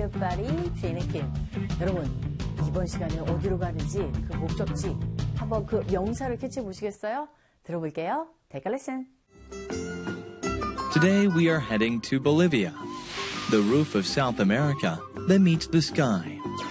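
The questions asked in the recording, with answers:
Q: 여러분, 이번 시간에 어디로 가는지, 그 목적지, 한번 그 명사를 캐치해 보시겠어요?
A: Bolivia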